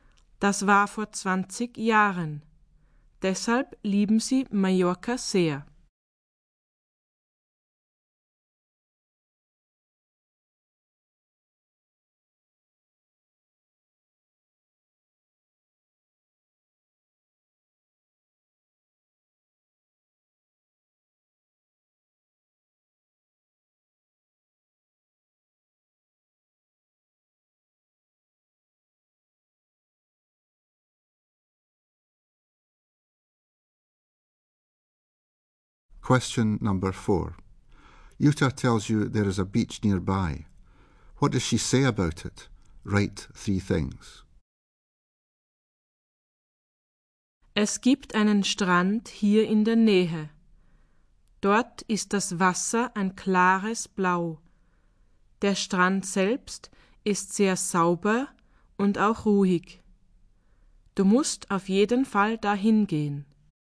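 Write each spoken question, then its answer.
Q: What does she say about it?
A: The water is clear blue; the beach is very clean; it is quiet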